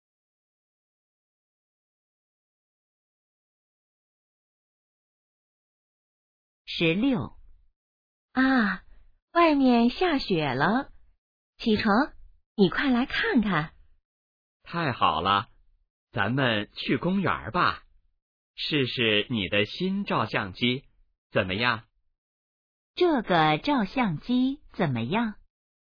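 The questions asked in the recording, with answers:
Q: 这个照相机怎么样?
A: 是新的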